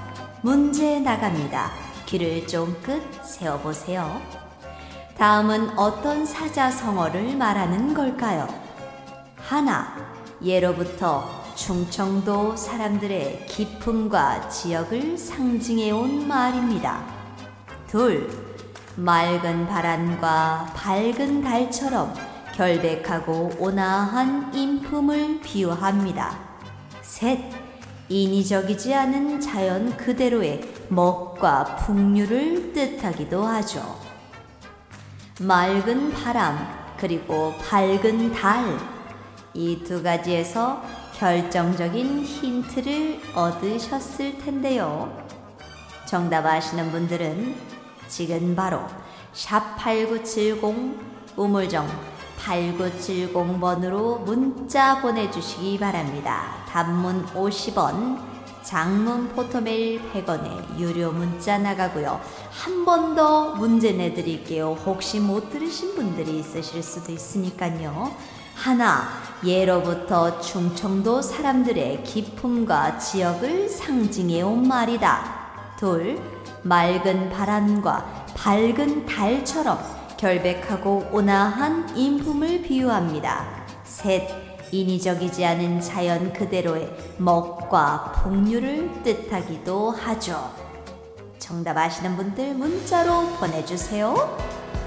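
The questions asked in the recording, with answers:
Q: 다음은 어떤 사자성어를 말하는 걸까요?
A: 청풍명월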